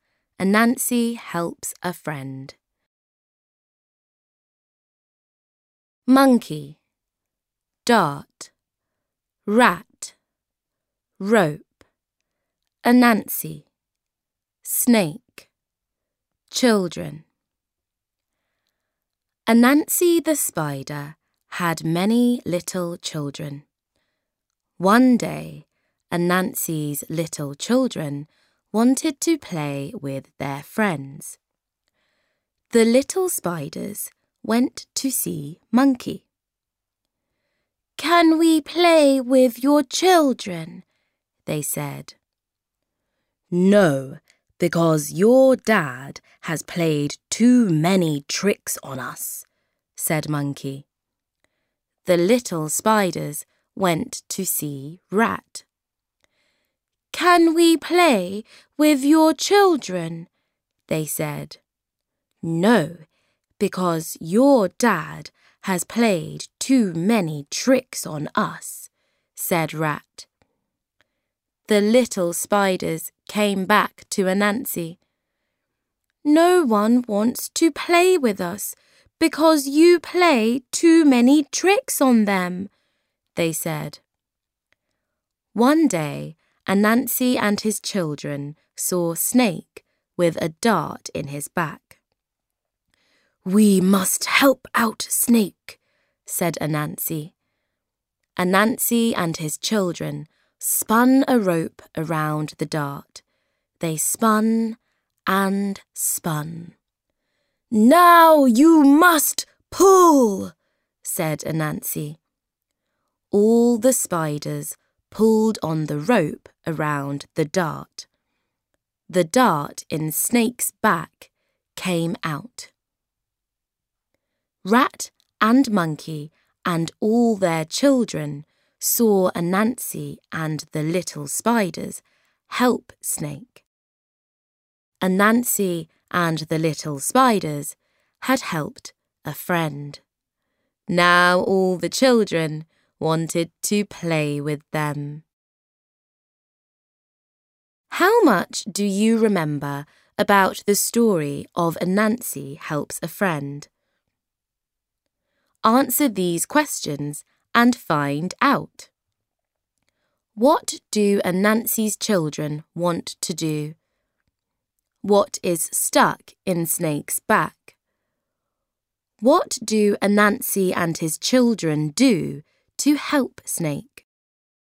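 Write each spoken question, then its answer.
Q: What do Anansi's children want to do?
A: Play with their friends

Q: What is stuck in Snake's back?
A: A dart

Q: What do Anansi and his children do to help Snake?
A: They spin a rope around the dart and pull it out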